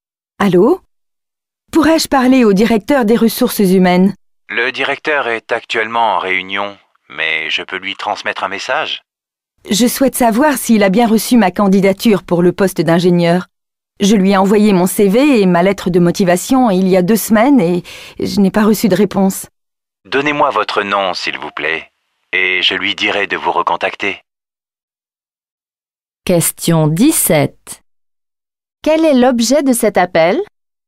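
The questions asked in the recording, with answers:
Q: Quel est l'objet de cet appel ?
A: Savoir si le directeur a bien reçu sa candidature pour le poste d'ingénieur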